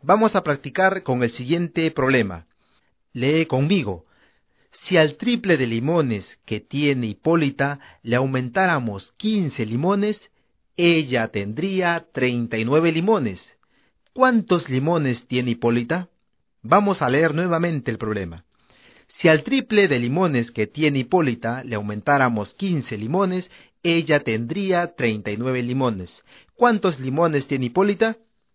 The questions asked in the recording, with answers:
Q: ¿Cuántos limones tiene Hipólita?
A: Hipólita tiene 8 limones